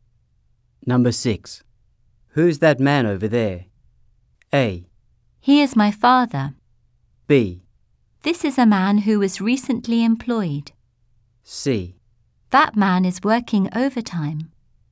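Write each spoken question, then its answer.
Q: Who's that man over there?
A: A: He is my father.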